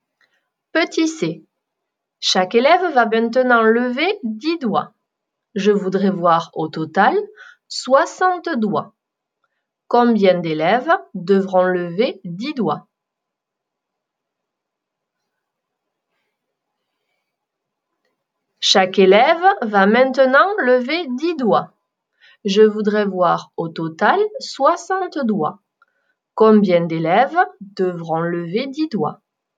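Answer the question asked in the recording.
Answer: 6 élèves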